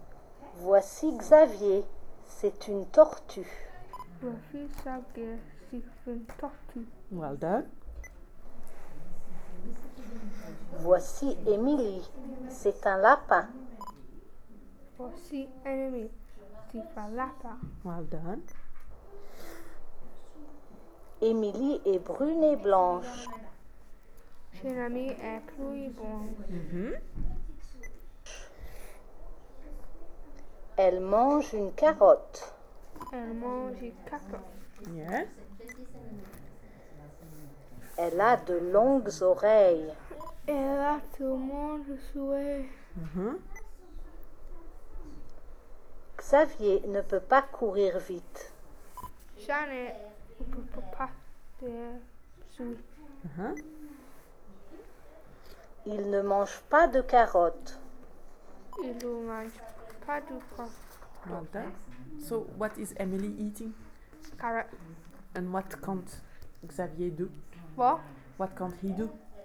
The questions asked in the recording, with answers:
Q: So, what is Emily eating?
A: Carrot.

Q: What can't he do?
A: Run.